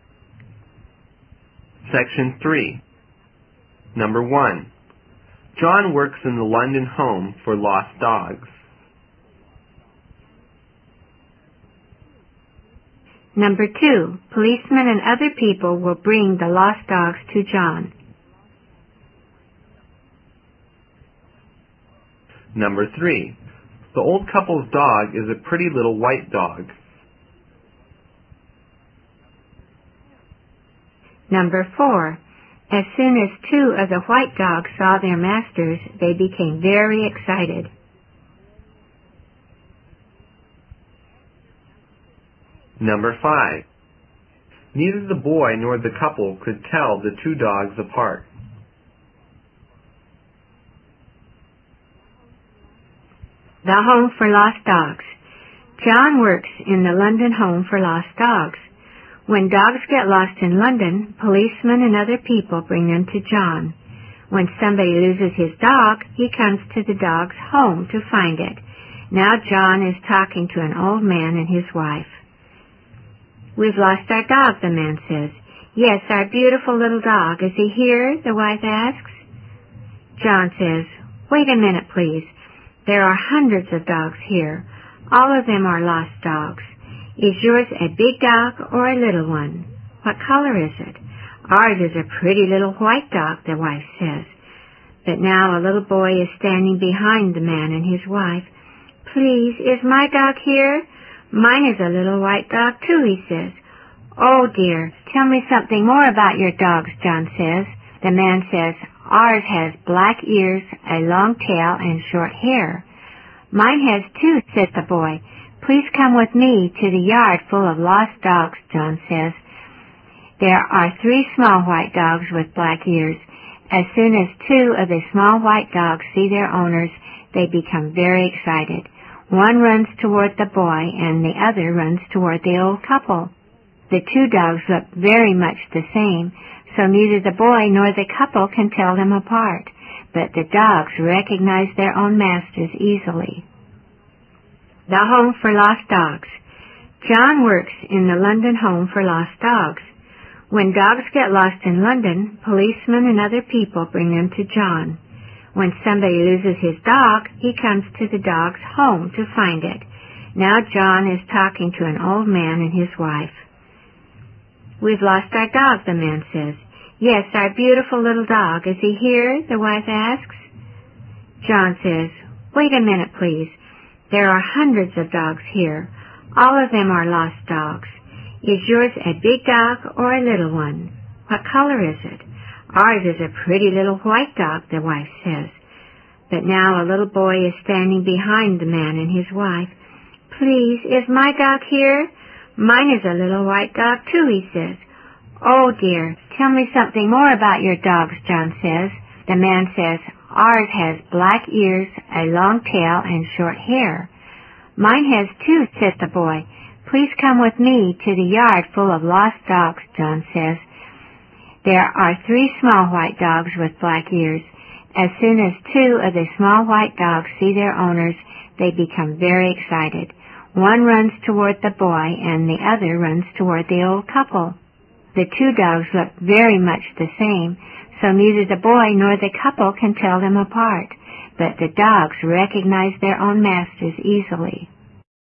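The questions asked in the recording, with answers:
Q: John works in the London Home for Lost Dogs.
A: True

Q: Policemen and other people will bring the lost dogs to John.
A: True

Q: The old couple's dog is a pretty little white dog.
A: True

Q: As soon as two of the white dogs saw their masters, they became very excited.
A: True

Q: Neither the boy nor the couple could tell the two dogs apart.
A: True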